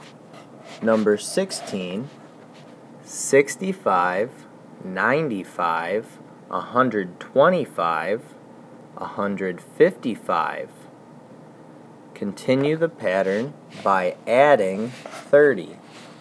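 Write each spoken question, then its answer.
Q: Continue the pattern by adding 30.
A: 185, 215, 245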